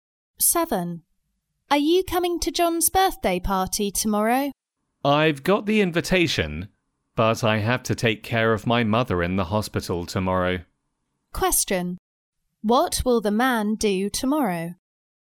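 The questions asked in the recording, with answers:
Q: What will the man do tomorrow?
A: Take care of his mother in the hospital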